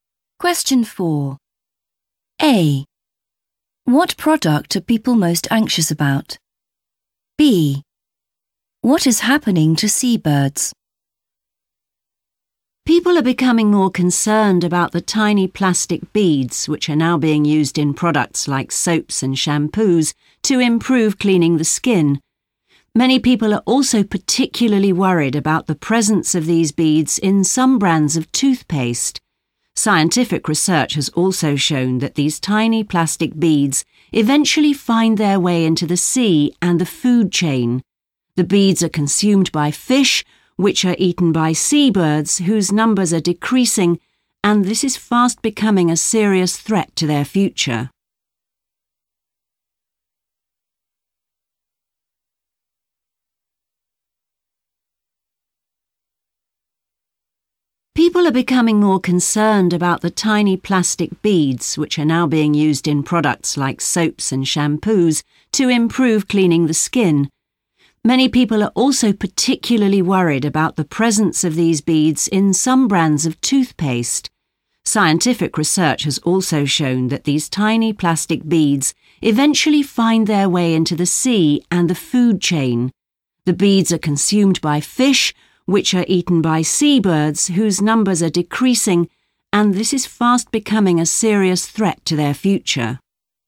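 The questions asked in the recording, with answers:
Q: What product are people most anxious about?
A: toothpaste

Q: What is happening to seabirds?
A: their numbers are decreasing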